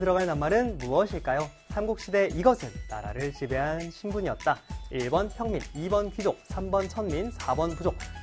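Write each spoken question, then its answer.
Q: 들어갈 낱말은 무엇일까요? 삼국시대 이것은 나라를 지배한 신분이었다.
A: 2: 귀족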